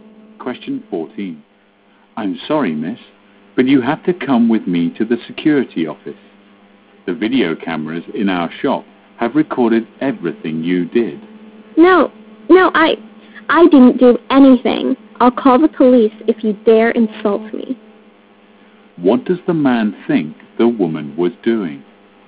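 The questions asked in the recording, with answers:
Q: What does the man think the woman was doing?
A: Stealing from the shop (shoplifting).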